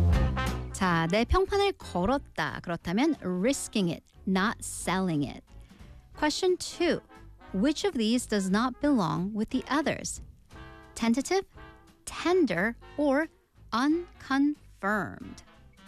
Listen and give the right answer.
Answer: It was tender.